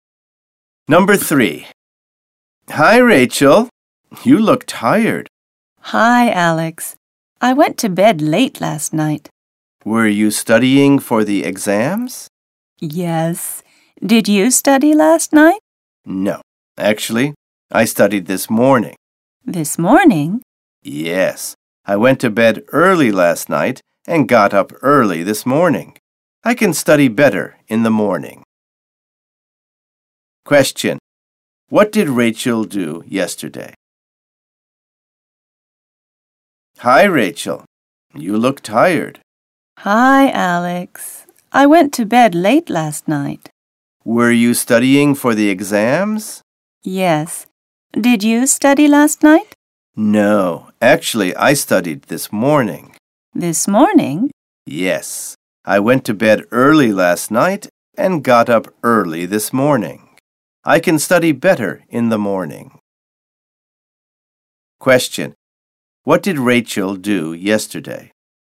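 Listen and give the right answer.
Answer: She studied for the exams and went to bed late.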